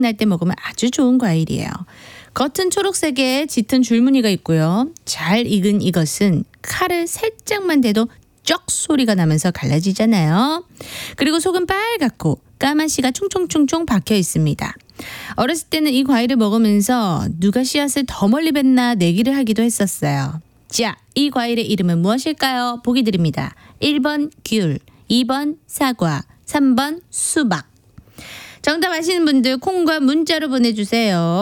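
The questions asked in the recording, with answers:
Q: 자, 이 과일의 이름은 무엇일까요?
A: 3번: 수박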